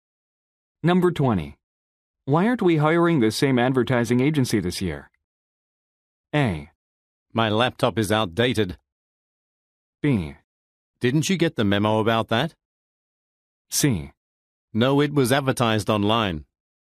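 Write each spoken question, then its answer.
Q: Why aren't we hiring the same advertising agency this year?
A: B: Didn't you get the memo about that?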